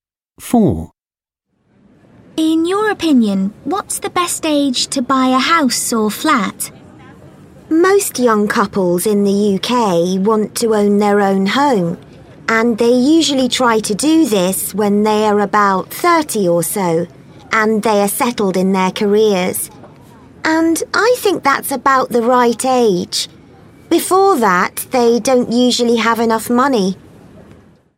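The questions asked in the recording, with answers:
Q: In your opinion, what's the best age to buy a house or flat?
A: About 30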